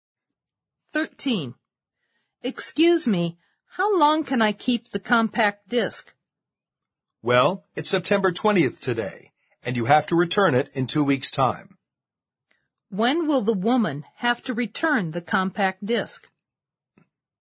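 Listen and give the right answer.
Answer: October 4th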